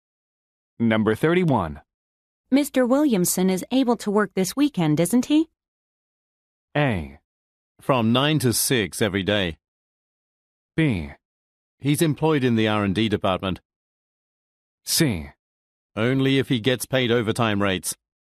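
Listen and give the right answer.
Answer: C: Only if he gets paid overtime rates.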